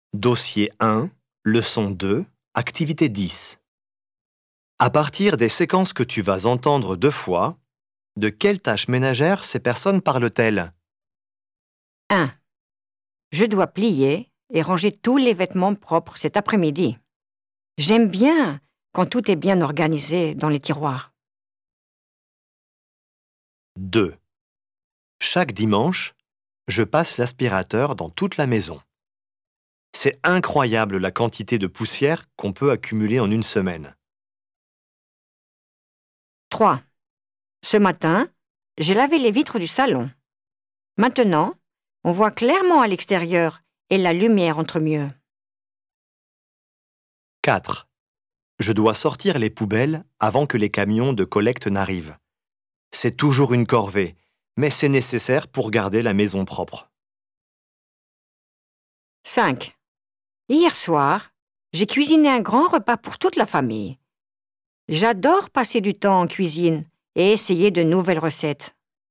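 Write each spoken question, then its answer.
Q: de quelles tâches ménagères ces personnes parlent-elles?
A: plier et ranger le linge

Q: de quelles tâches ménagères ces personnes parlent-elles?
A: passer l'aspirateur

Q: de quelles tâches ménagères ces personnes parlent-elles?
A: laver les vitres

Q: de quelles tâches ménagères ces personnes parlent-elles?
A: sortir les poubelles

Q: de quelles tâches ménagères ces personnes parlent-elles?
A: faire la cuisine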